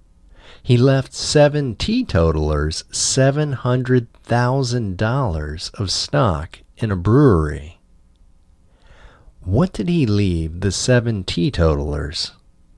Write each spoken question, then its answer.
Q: What did he leave the seven teetotalers?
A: He left the seven teetotalers $700,000 of stock in a brewery.